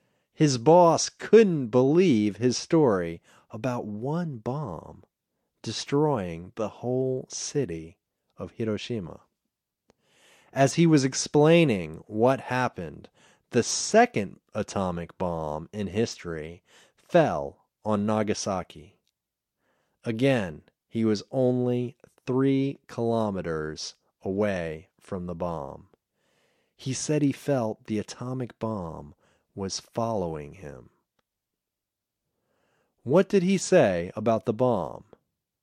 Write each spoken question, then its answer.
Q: What did he say about the bomb?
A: He said he felt the bomb was following him.